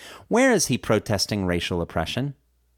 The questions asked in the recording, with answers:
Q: Where is he protesting racial oppression?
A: He's protesting racial oppression in the U.S.